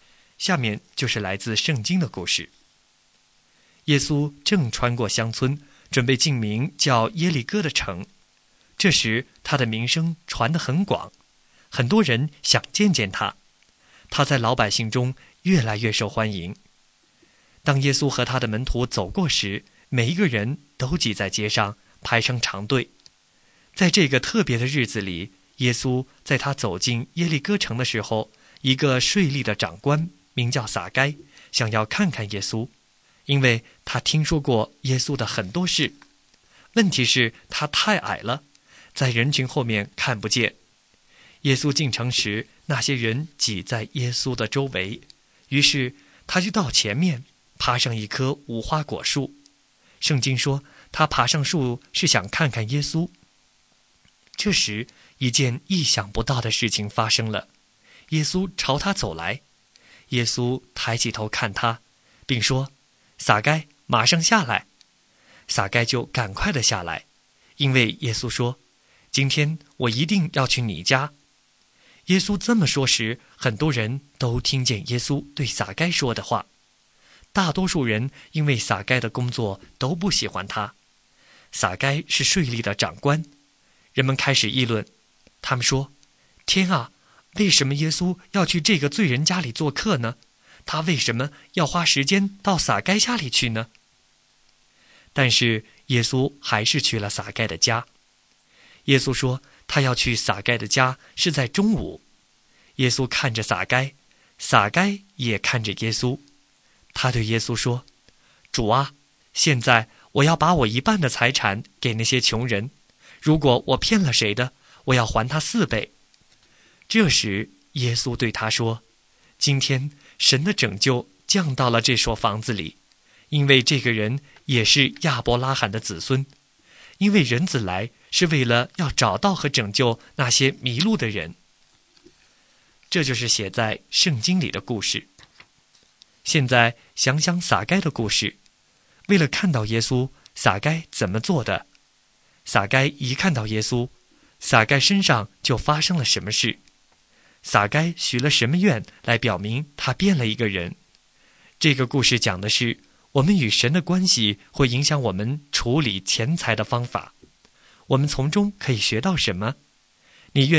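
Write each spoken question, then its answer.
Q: 为了看到耶稣,撒该怎么做的?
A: 他到前面爬上一棵无花果树

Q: 撒该许了什么愿来表明他变了一个人?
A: 把一半的财产给穷人,骗了谁的就还他四倍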